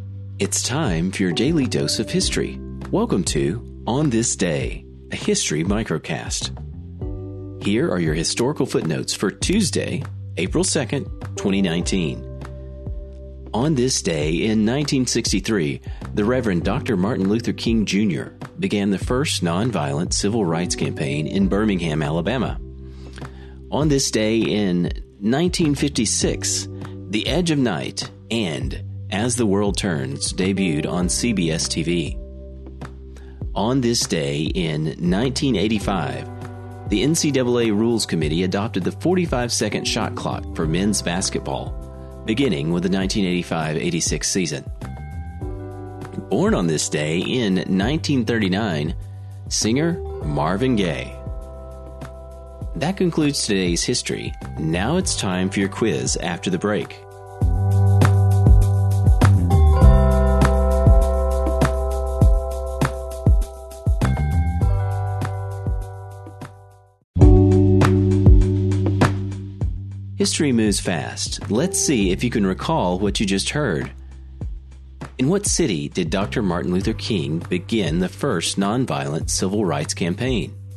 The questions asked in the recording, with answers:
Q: In what city did Dr. Martin Luther King begin the first nonviolent civil rights campaign?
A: The answer? Birmingham, Alabama.